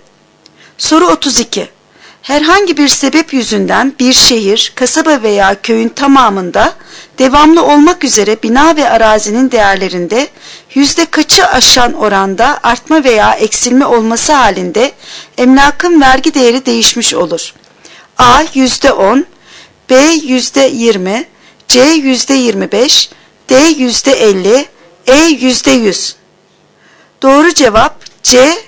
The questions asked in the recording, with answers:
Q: Herhangi bir sebep yüzünden bir şehir, kasaba veya köyün tamamında devamlı olmak üzere bina ve arazinin değerlerinde yüzde kaçı aşan oranda artma veya eksilme olması halinde emlakın vergi değeri değişmiş olur?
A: Doğru cevap C. %25.